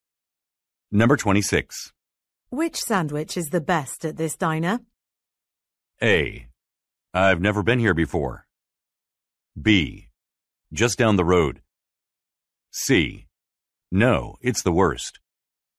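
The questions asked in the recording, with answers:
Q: Which sandwich is the best at this diner?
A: A: I've never been here before.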